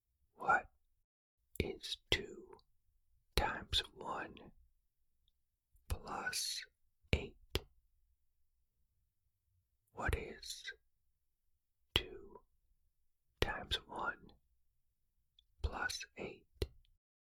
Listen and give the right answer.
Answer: The answer is 10.